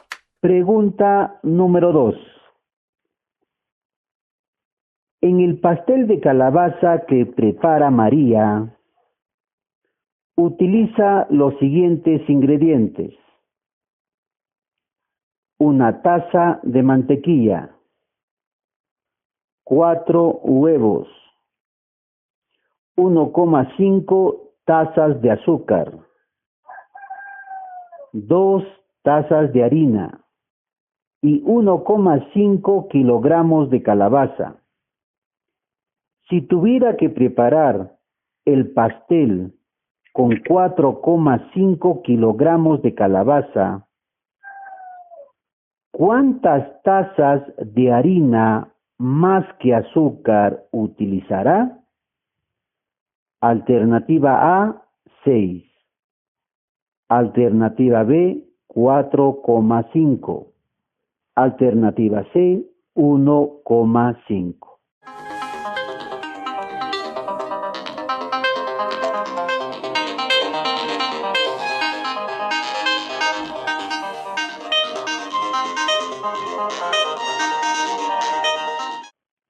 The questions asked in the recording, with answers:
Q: ¿cuántas tazas de harina más que azúcar utilizará?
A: La respuesta correcta es la alternativa C, 1,5.